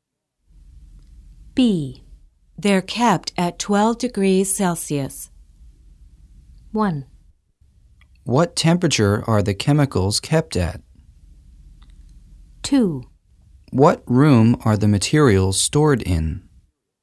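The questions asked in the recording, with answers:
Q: They're kept at 12 degrees Celsius.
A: 1: What temperature are the chemicals kept at?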